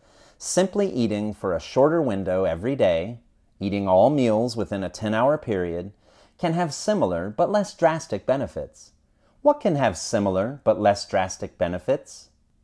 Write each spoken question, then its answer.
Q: What can have similar but less drastic benefits?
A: Eating for a shorter window every day can have similar but less drastic benefits.